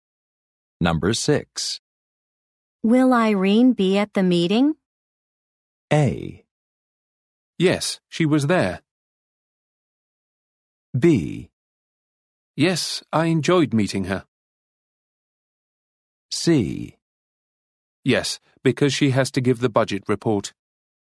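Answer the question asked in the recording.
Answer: C: Yes, because she has to give the budget report.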